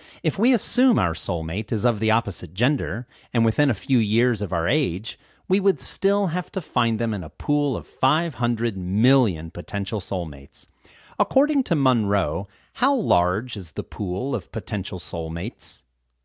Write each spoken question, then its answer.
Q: According to Munroe, how large is the pool of potential soulmates?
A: According to Munroe, the pool of potential soulmates is 500 million.